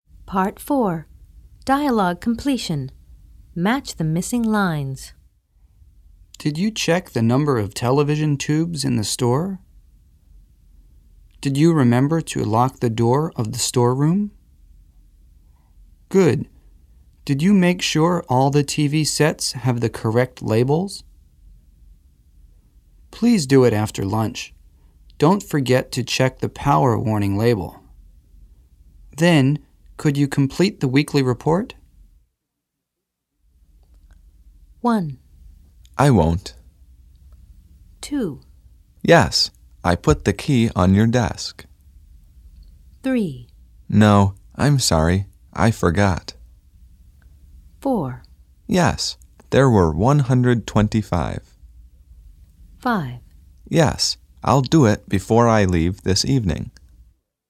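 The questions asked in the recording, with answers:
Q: I won't.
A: Don't forget to check the power warning label.

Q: Yes, I put the key on your desk.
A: Did you remember to lock the door of the storeroom?

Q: No, I'm sorry, I forgot.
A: Good. Did you make sure all the TV sets have the correct labels?

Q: Yes, there were 125.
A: Did you check the number of television tubes in the store?

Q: Yes, I'll do it before I leave this evening.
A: Then, could you complete the weekly report?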